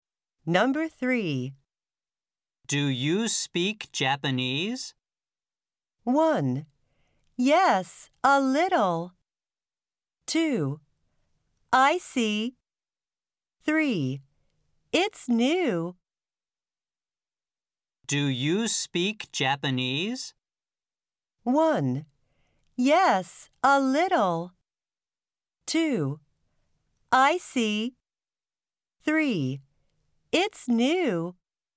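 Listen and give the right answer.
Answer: 1: Yes, a little.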